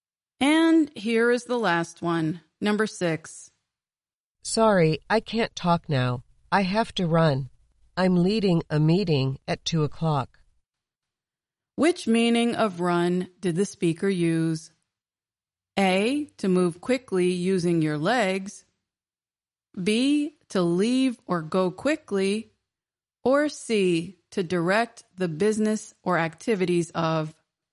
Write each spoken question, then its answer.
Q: Which meaning of run did the speaker use?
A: The answer is B, to leave or go quickly.